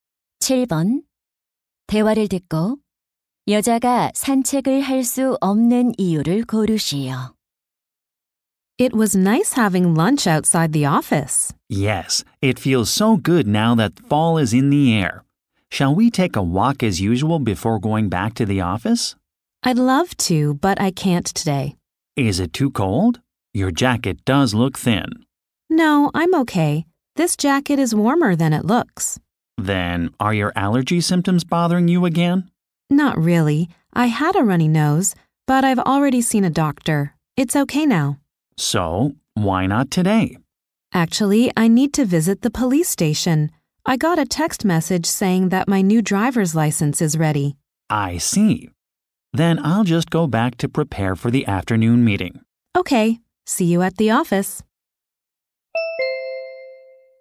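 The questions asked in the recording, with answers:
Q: 대화를 듣고 여자가 산책을 할 수 없는 이유를 고르시오.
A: 새 운전면허증을 찾으러 경찰서에 가야 해서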